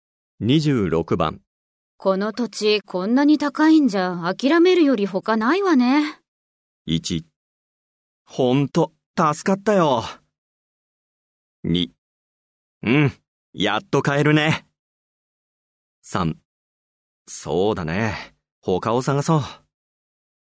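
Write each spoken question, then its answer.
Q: この土地こんなに高いんじゃ諦めるより他ないわね。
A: 3: そうだね、他を探そう。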